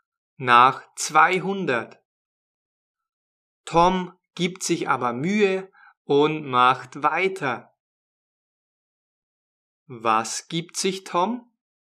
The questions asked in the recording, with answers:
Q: Was gibt sich Tom?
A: Mühe.